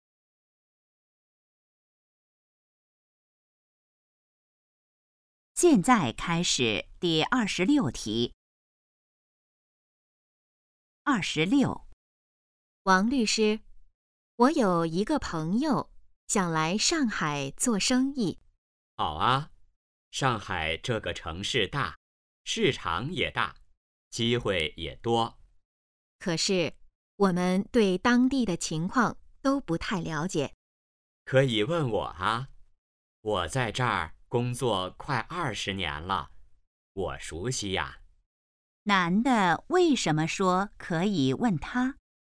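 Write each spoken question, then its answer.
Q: 男的为什么说可以问他?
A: 他熟悉当地情况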